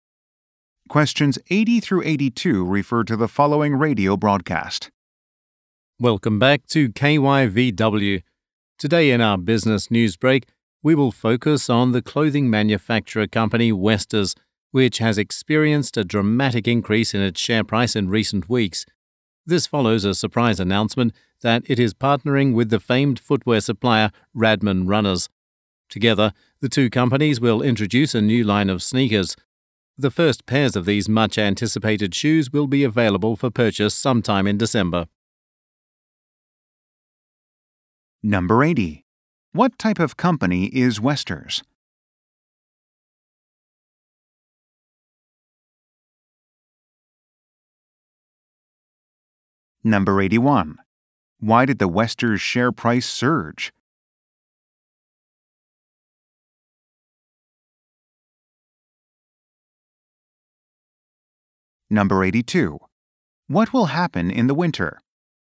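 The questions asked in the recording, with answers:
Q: What type of company is Westers?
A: A clothing manufacturer

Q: Why did the Westers share price surge?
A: It announced a partnership with Radman Runners

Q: What will happen in the winter?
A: A new line of sneakers will go on sale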